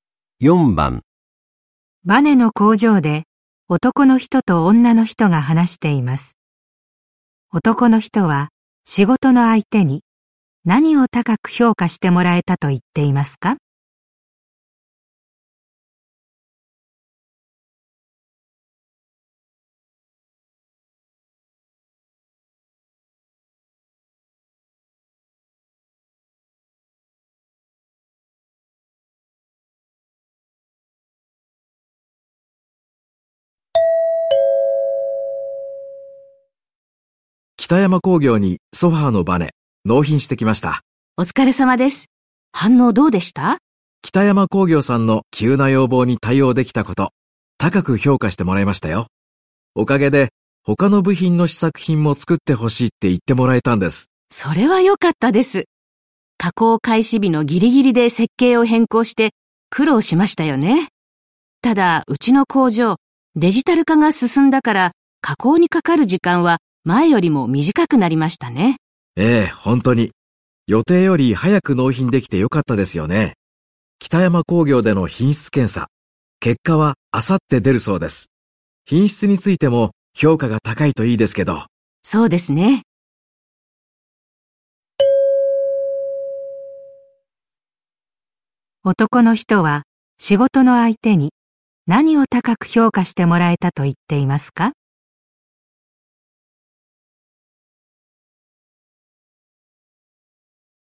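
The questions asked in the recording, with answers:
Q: 男の人は仕事の相手に何を高く評価してもらえたと言っていますか?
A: 急な要望(設計変更)に対応できたこと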